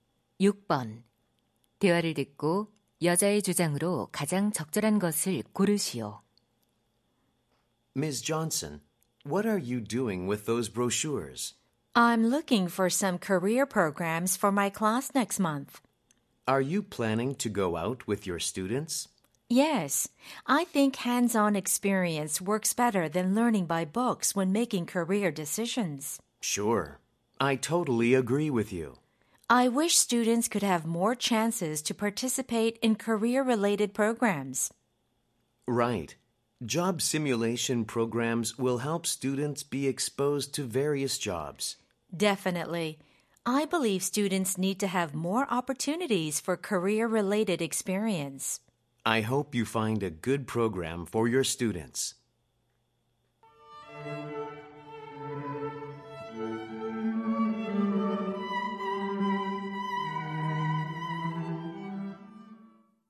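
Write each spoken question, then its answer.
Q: 대화를 듣고 여자의 주장으로 가장 적절한 것을 고르시오.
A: 학생들에게 진로 관련 체험 기회가 더 필요하다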